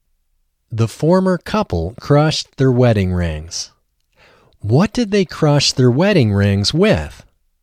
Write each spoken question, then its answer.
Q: What did they crush their wedding rings with?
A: They crushed their wedding rings with a hammer.